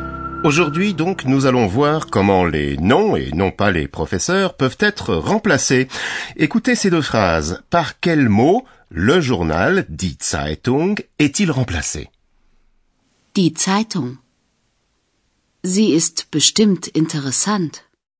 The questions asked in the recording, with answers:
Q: Par quel mot le journal, die Zeitung, est-il remplacé?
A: Eh bien, le journal, die Zeitung, est remplacé par le pronom zi.